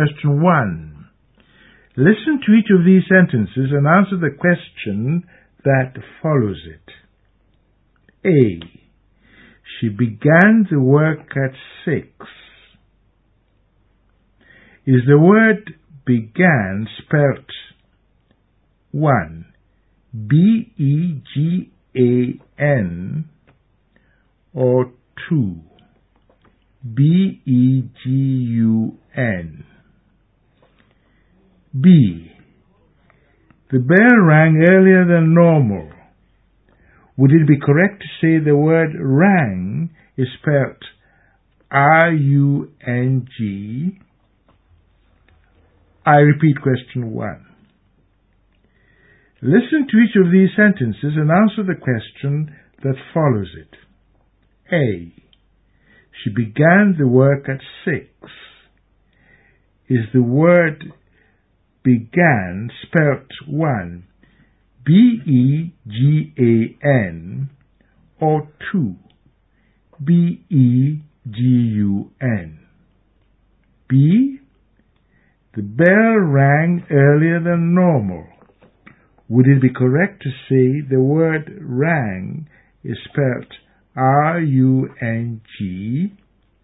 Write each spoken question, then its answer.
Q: Is the word began spelt 1,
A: The word is spelt B-E-G-A-N.

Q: Would it be correct to say the word rang is spelt R-U-N-G?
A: No. The word is spelled R-A-N-G.